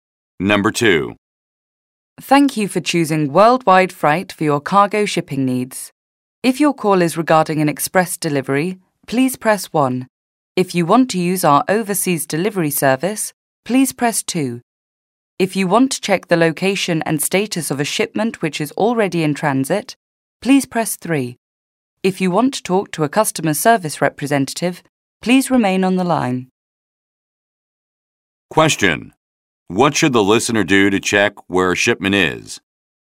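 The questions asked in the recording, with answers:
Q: What should the listener do to check where a shipment is?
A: Press 3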